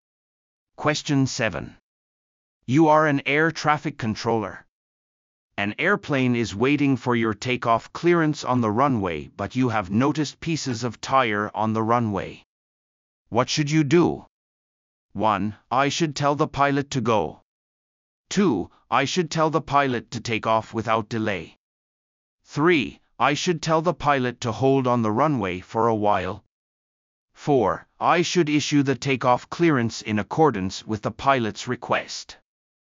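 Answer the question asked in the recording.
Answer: 3: I should tell the pilot to hold on the runway for a while.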